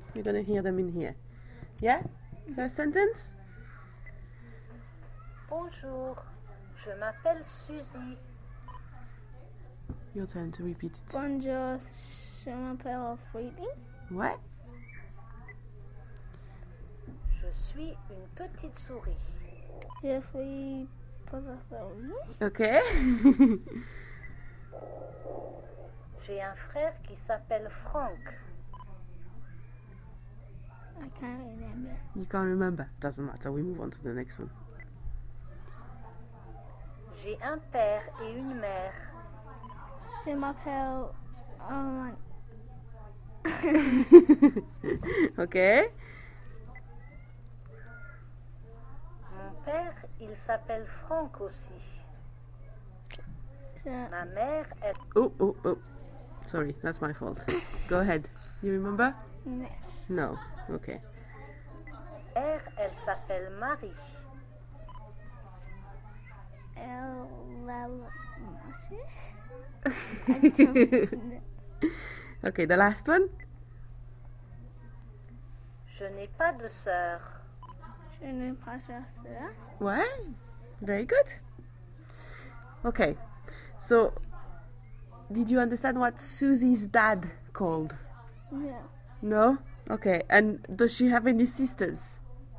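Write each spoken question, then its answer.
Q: So did you understand what Susie's dad called?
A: Frank

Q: and does she have any sisters?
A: No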